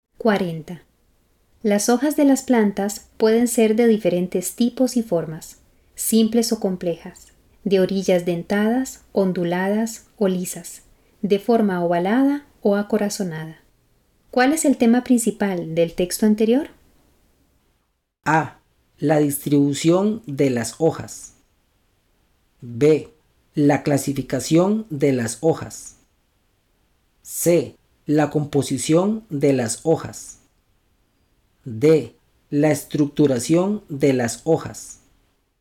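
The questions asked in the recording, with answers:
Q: ¿Cuál es el tema principal del texto anterior?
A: B: La clasificación de las hojas.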